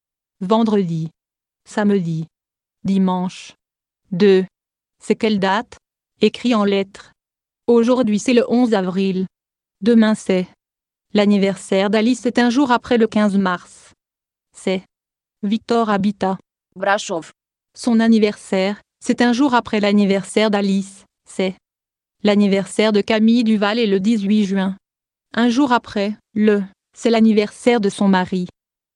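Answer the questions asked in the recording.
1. le douze avril
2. le seize mars
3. le dix-sept mars
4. le dix-neuf juin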